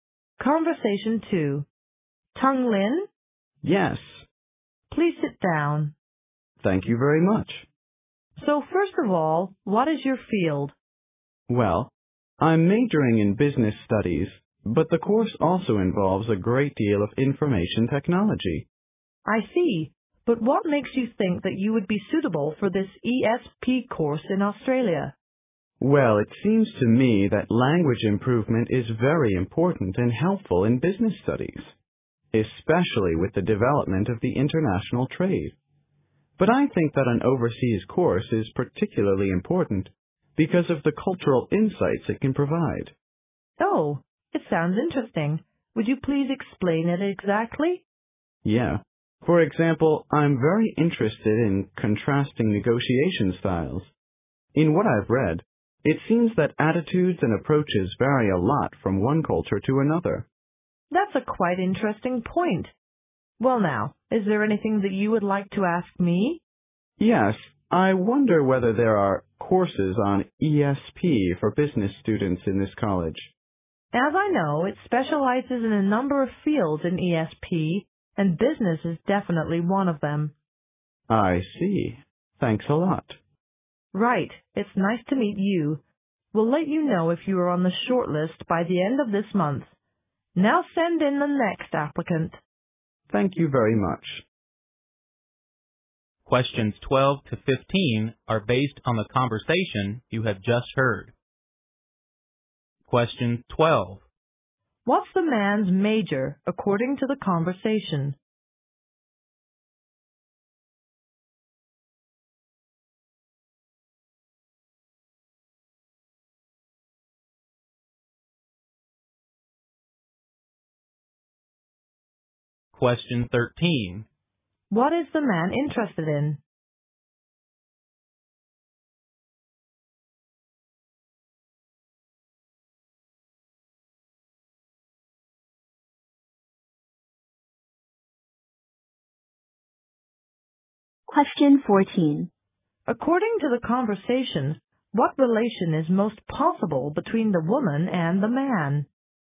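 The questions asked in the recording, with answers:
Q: What's the man's major according to the conversation?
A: Business studies

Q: What is the man interested in?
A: Contrasting negotiation styles

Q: According to the conversation, what relation is most possible between the woman and the man?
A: Interviewer and applicant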